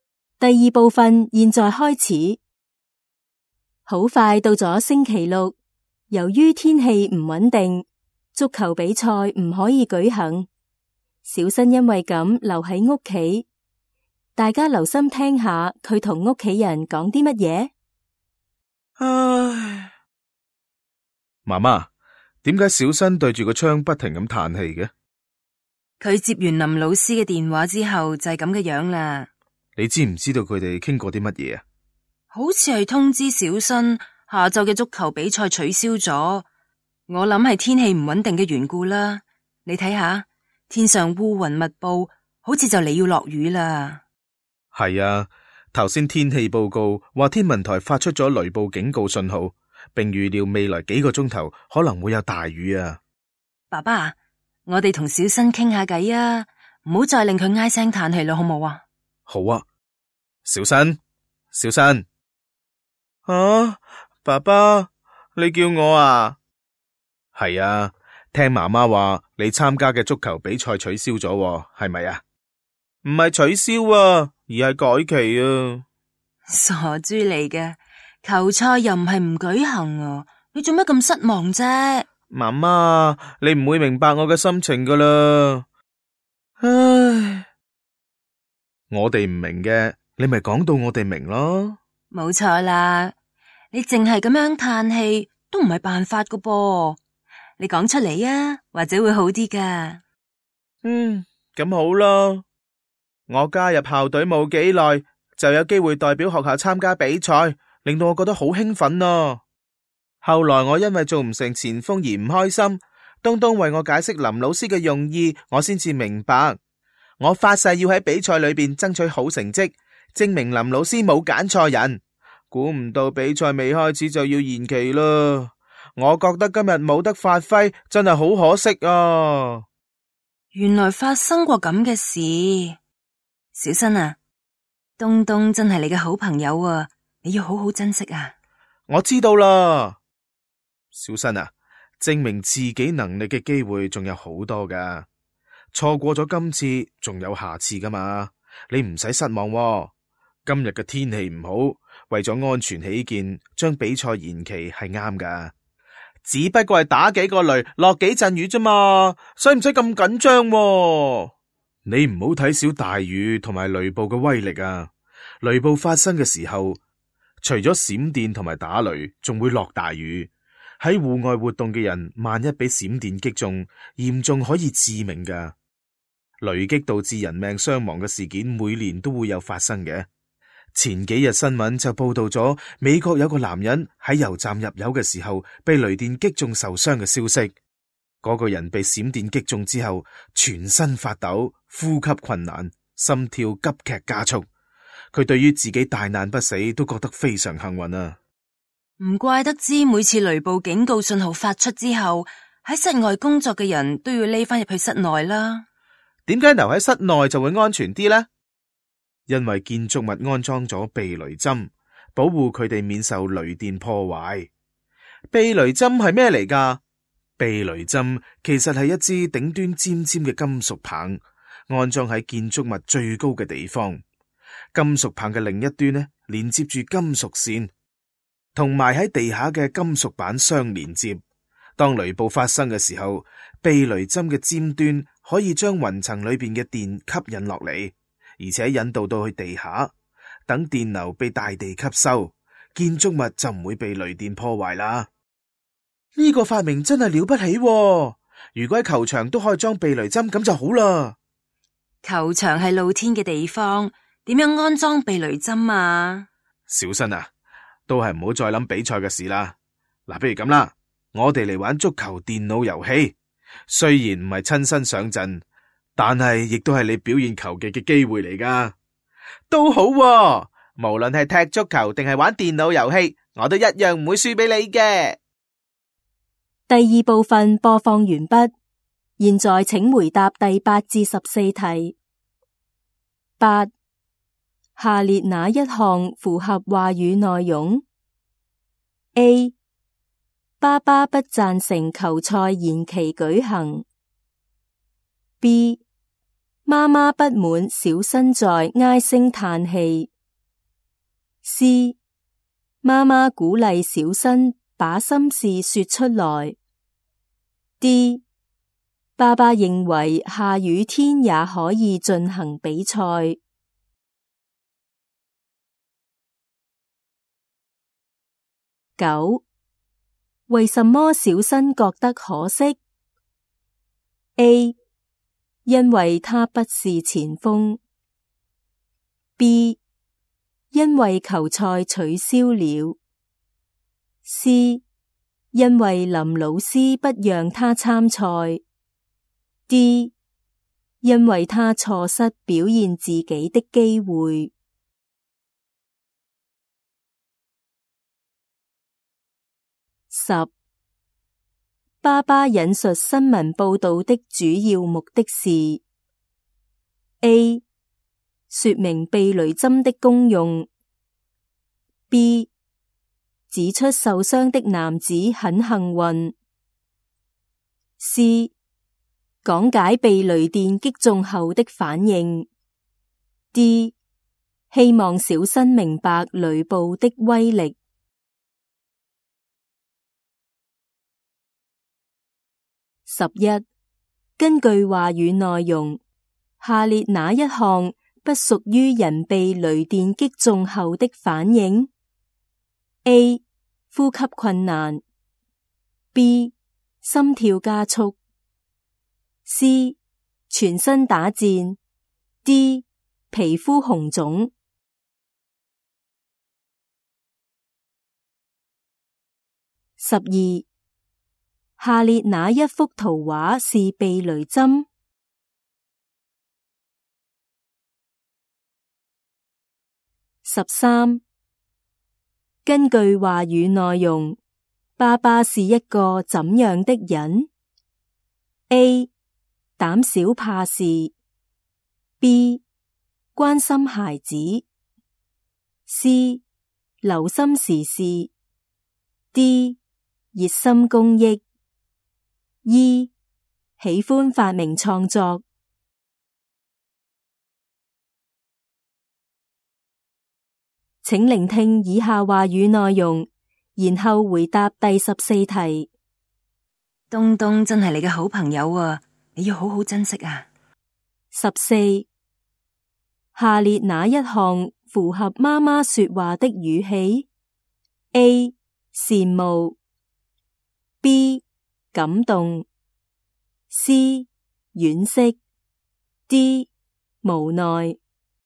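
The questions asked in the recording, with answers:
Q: 下列哪一项符合话语内容 ?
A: C: 妈妈鼓励小新把心事说出来。

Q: 为什么小新觉得可惜?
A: D: 因为他错失表现自己的机会。

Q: 爸爸引述新闻报道的主要目的是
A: D: 希望小新明白雷暴的威力。

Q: 根据话语内容,下列哪一项不属于人被雷电击中后的反应?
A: D: 皮肤红肿。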